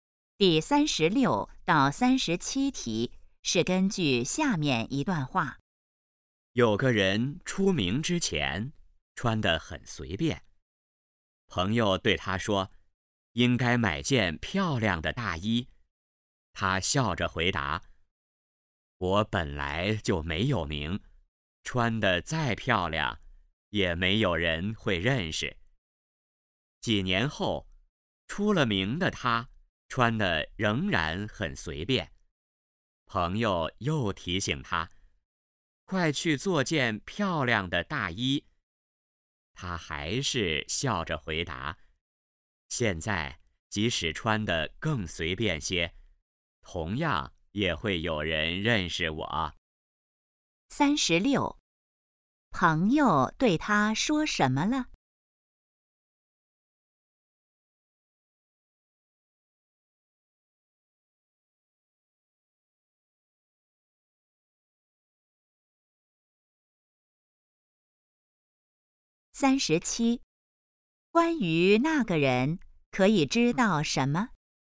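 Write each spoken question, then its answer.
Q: 朋友对他说什么了?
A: 应该买件漂亮的大衣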